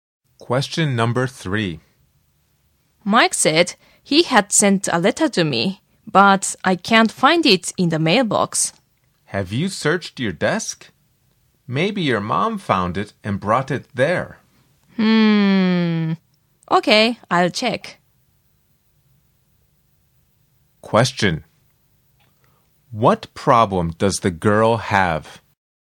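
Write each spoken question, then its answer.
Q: What problem does the girl have?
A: She can't find the letter Mike sent her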